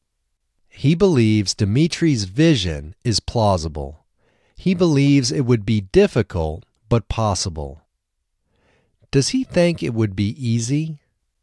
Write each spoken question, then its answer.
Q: Does he think it would be easy?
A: No, he doesn't think it would be easy.